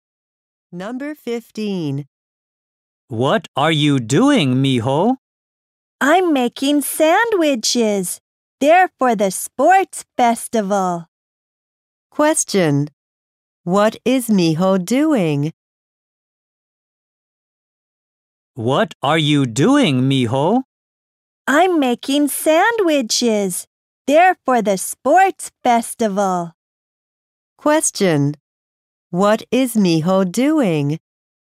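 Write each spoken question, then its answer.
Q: What is Miho doing?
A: Making sandwiches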